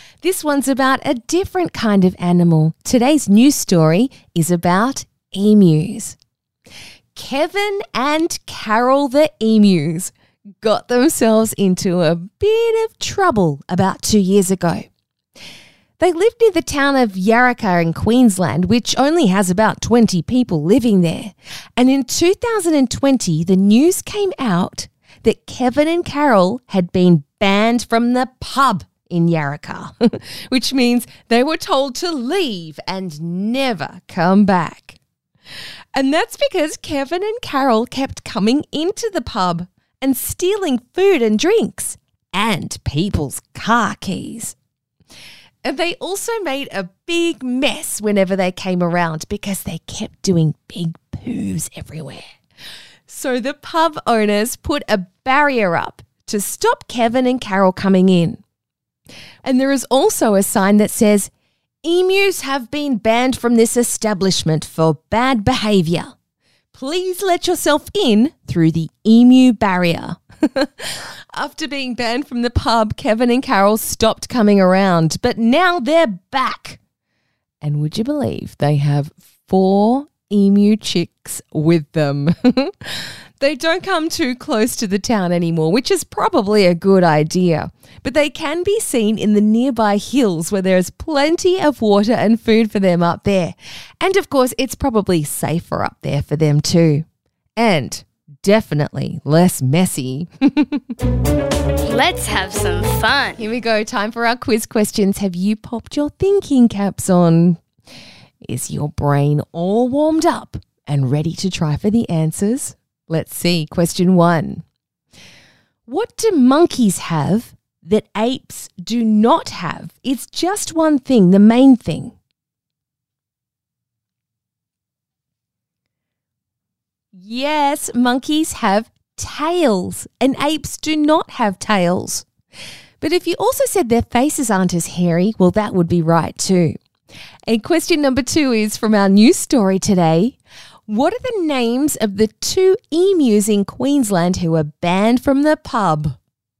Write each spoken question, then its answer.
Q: What are the names of the 2 emus in Queensland who were banned from the pub?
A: Kevin and Carol, those cheeky creatures.